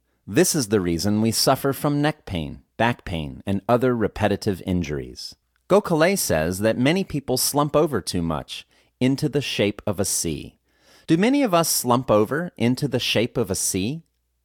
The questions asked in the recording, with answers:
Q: Do many of us slump over into the shape of a C?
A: Yes, many of us slump over into the shape of a C.